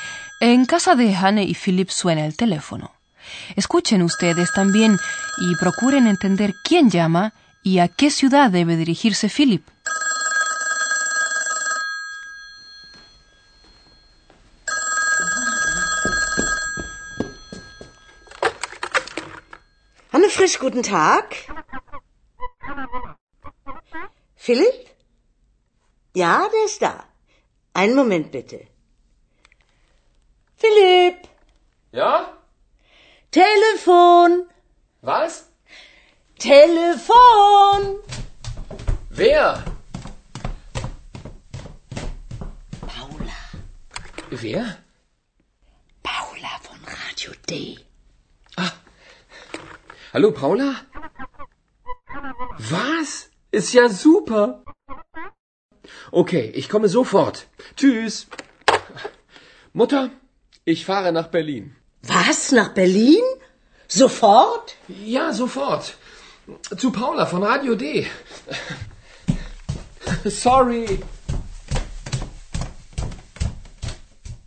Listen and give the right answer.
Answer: Una mujer, de nombre Paula, de la emisora Radio D, al parecer, ha llamado por teléfono.